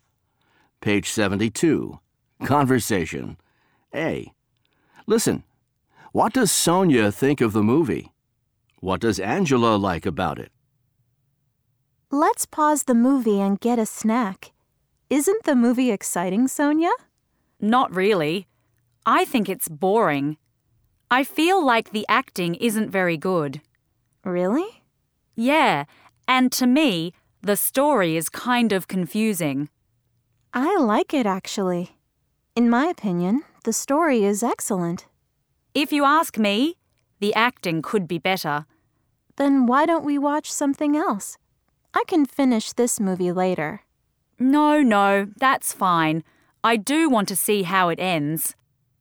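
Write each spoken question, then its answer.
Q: What does Sonia think of the movie?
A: She thinks it's boring.

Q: What does Angela like about it?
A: The story; she thinks it's excellent.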